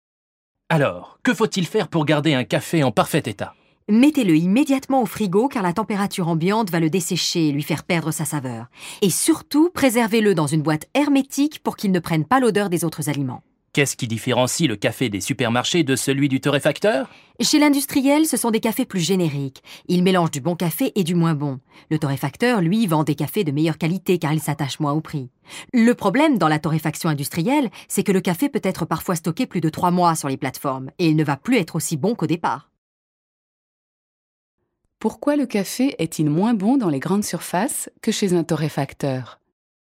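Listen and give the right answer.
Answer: Parce que c'est un café générique, un mélange de bon et de moins bon café, parfois stocké plus de 3 mois, alors que le torréfacteur s'attache moins au prix et vend un café de meilleure qualité.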